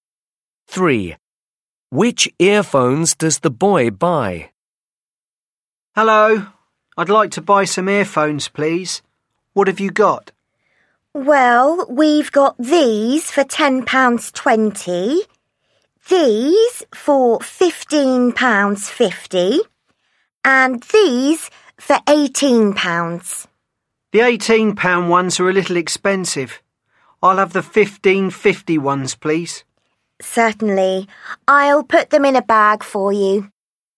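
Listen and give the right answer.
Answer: the £15.50 ones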